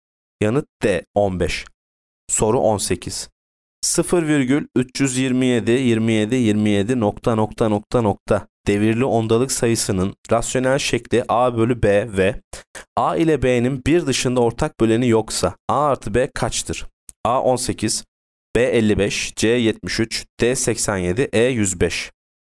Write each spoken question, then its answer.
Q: 0,327,27,27 nokta nokta nokta nokta devirli ondalık sayısının rasyonel şekli A bölü B ve A ile B'nin bir dışında ortak böleni yoksa A artı B kaçtır?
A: Yanıt C 73.